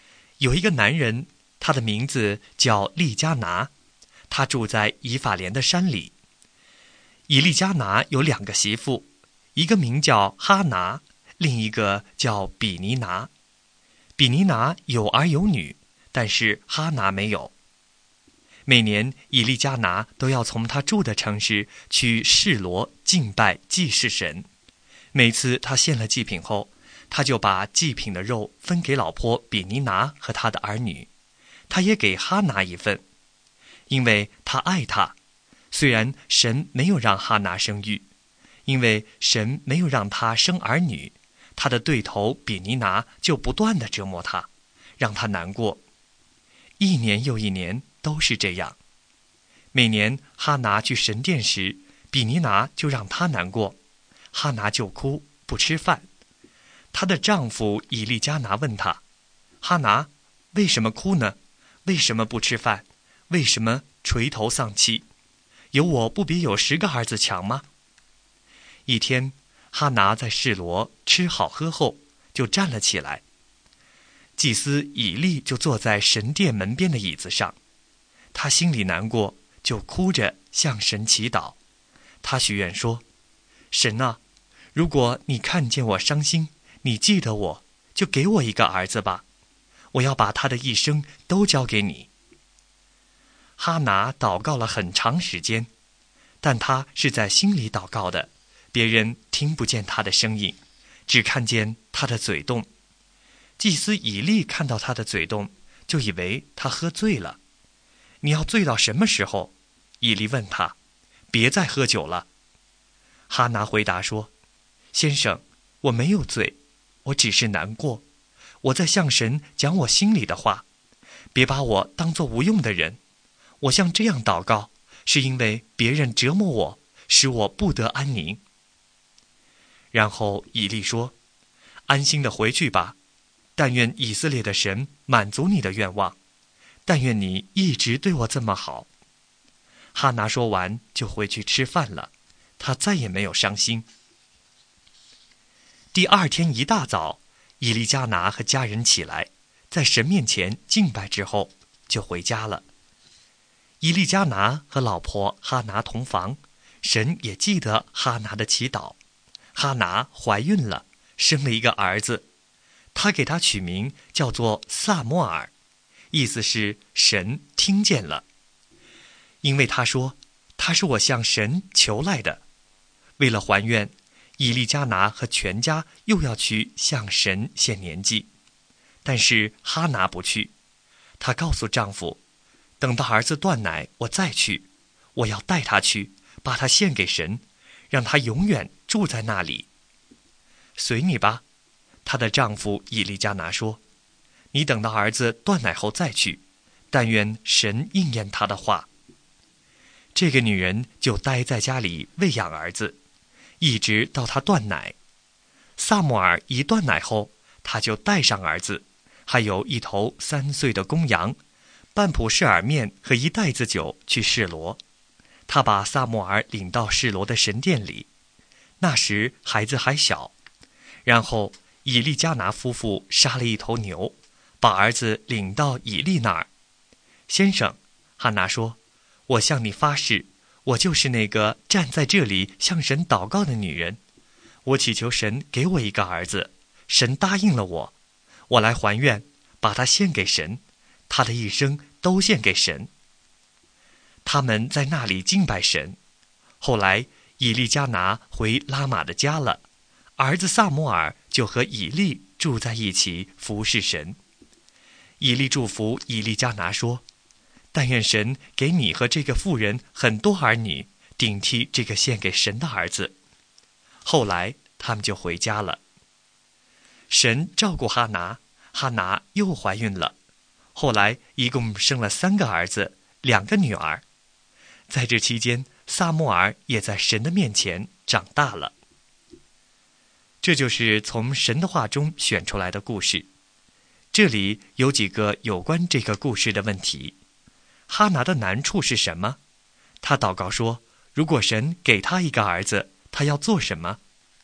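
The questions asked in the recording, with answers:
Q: 哈拿的难处是什么?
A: 她没有儿女,比尼拿不断折磨她

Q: 他祷告说,如果神给他一个儿子,他要做什么?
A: 把他的一生都交给神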